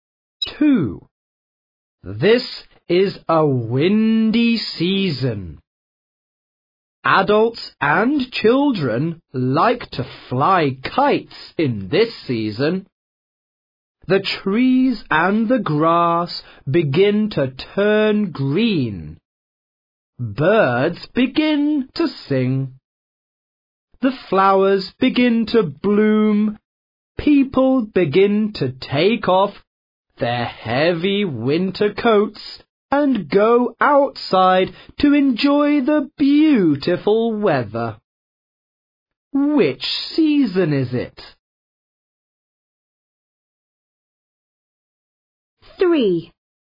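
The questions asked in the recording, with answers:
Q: Which season is it?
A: spring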